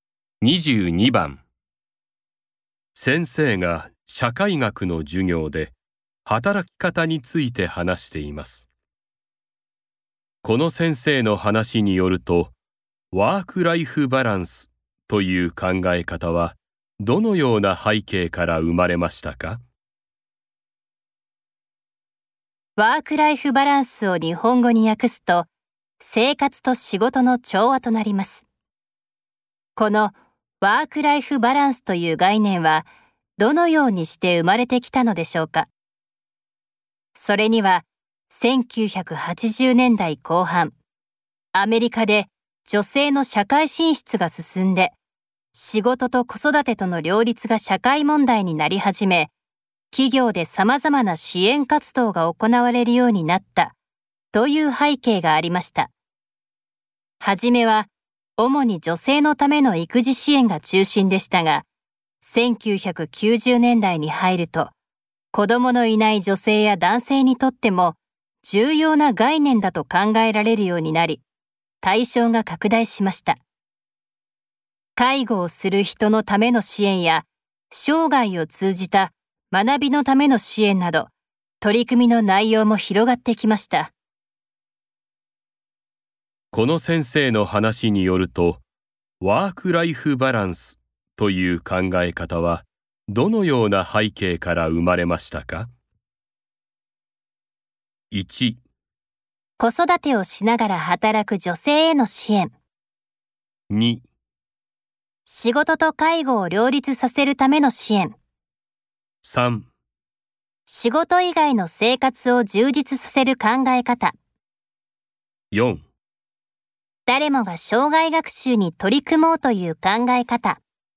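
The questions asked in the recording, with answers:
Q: この先生の話によると、ワーク・ライフ・バランスという考え方はどのような背景から生まれましたか?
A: 1: 子育てをしながら働く女性への支援。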